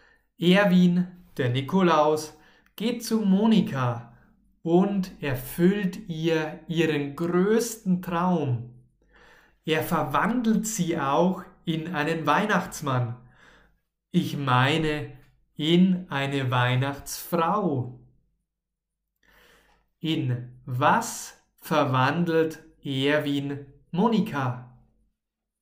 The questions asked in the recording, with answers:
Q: In was verwandelt Erwin Monika?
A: In eine Weihnachtsfrau natürlich.